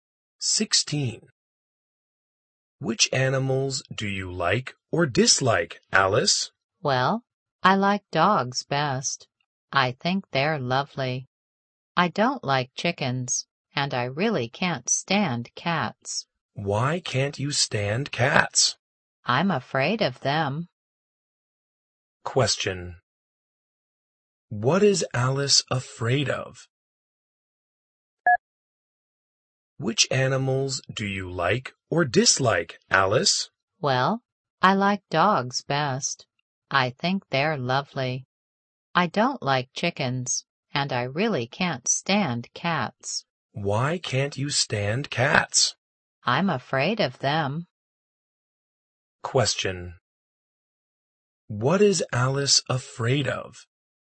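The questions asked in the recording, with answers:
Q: What is Alice afraid of?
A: Cats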